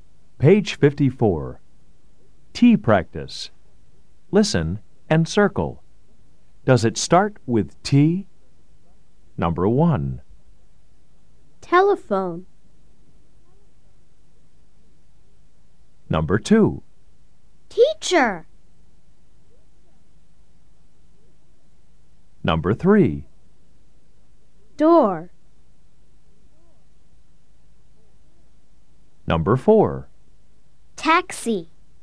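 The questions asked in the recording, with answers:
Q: Number 1.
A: yes

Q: Number 2.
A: yes

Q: Number 3.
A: no

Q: Number 4.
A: yes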